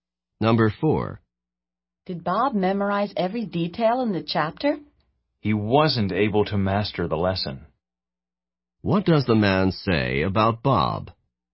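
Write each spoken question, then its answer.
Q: What does the man say about Bob?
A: Bob didn't memorize every detail; he couldn't master the lesson.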